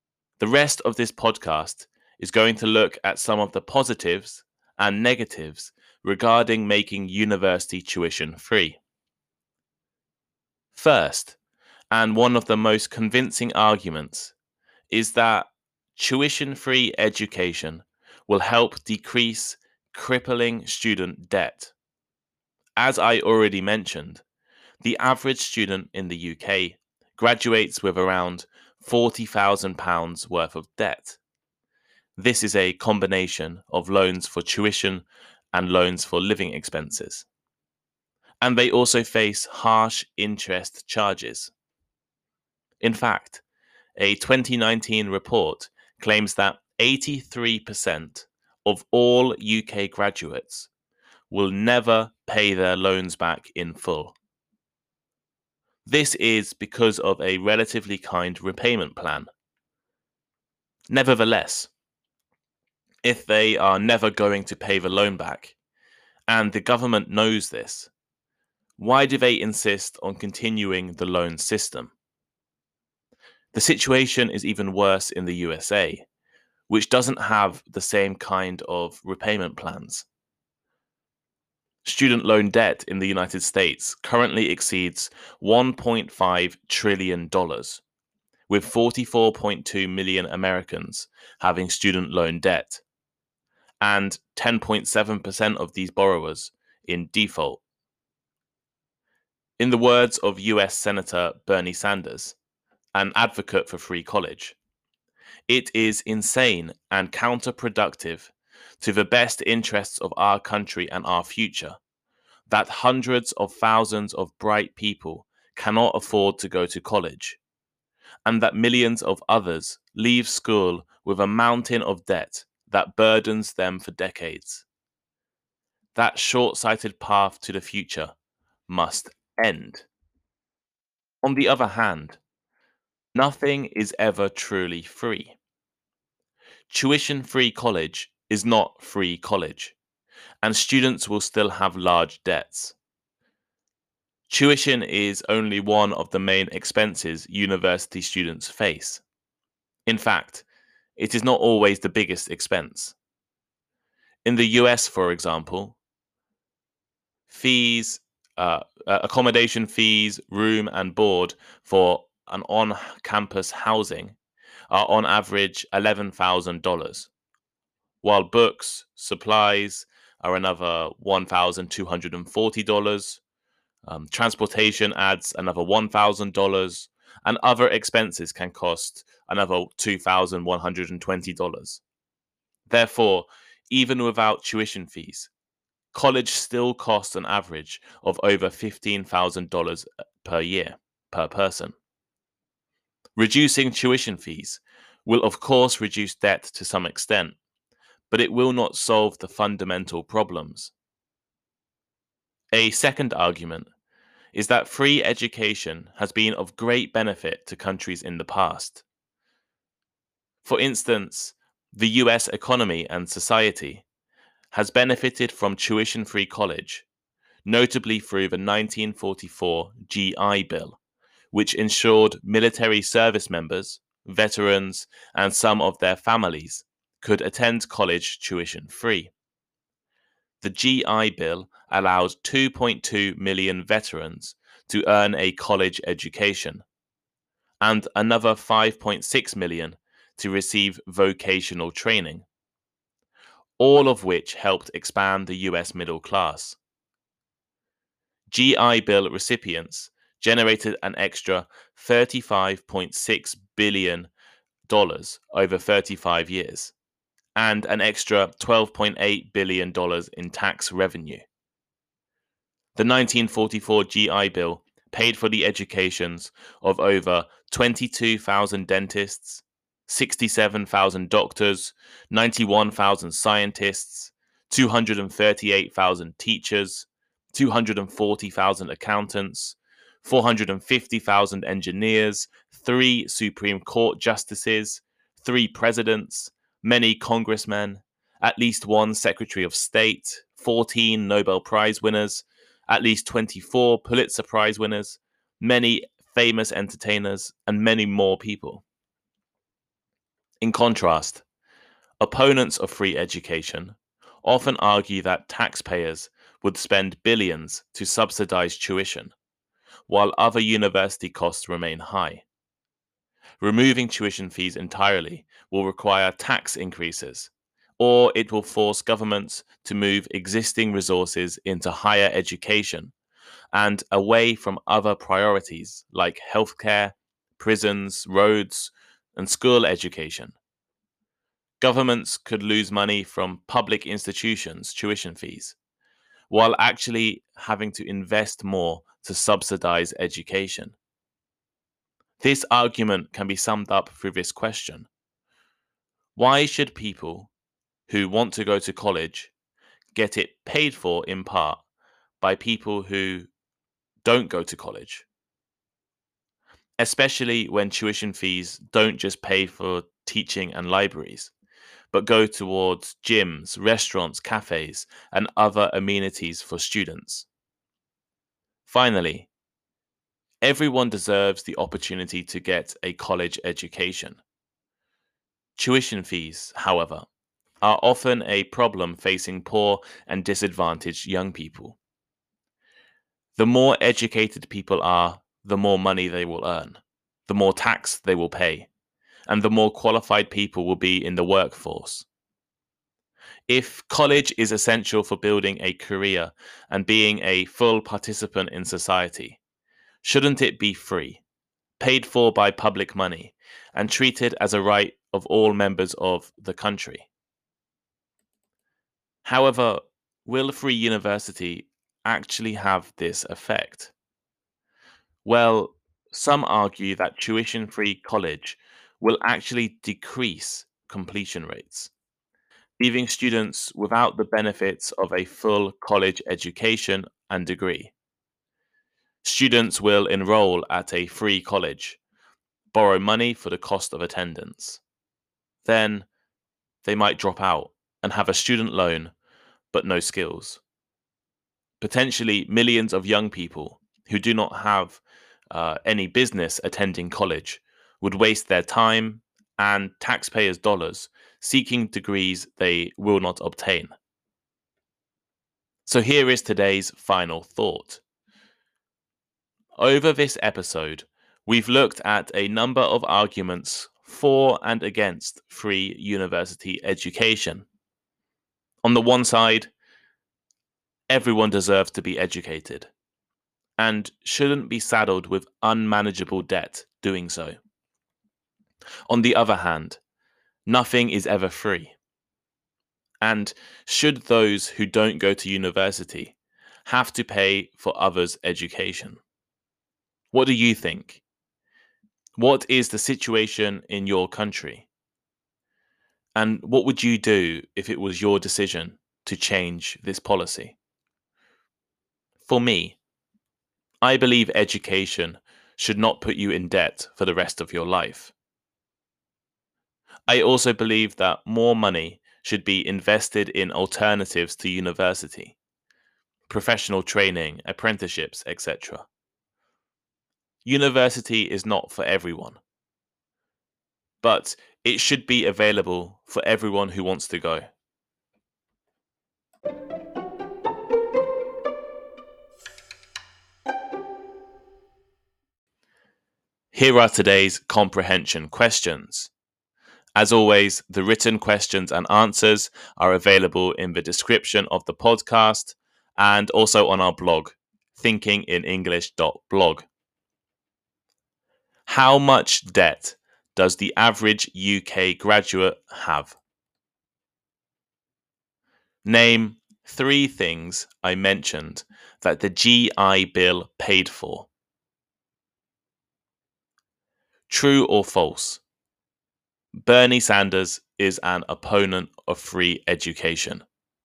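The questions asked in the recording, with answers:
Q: How much debt does the average UK graduate have?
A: Around £40,000

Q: Name three things I mentioned that the GI Bill paid for.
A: The educations of e.g. dentists, doctors, scientists (also teachers, accountants, engineers)

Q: True or false? Bernie Sanders is an opponent of free education.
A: False; he is an advocate for free college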